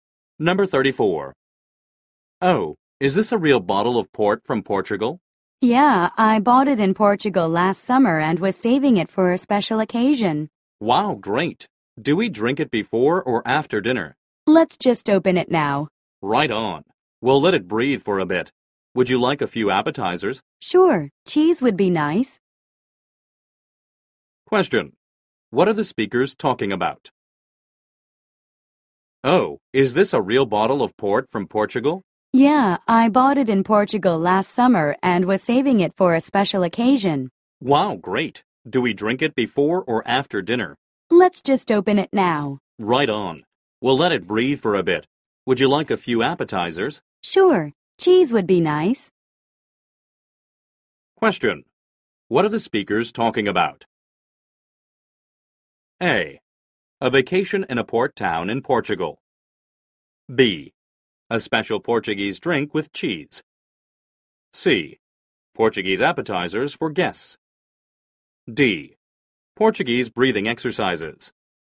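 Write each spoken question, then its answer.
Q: What are the speakers talking about?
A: B: A special Portuguese drink with cheese.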